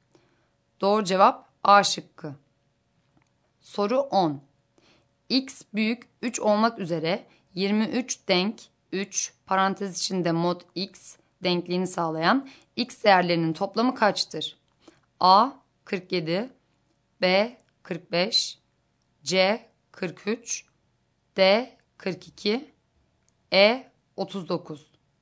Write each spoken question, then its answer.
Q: X büyük 3 olmak üzere 23 denk 3 parantez içinde mod X denkliğini sağlayan X değerlerinin toplamı kaçtır?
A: Doğru cevap E şıkkı.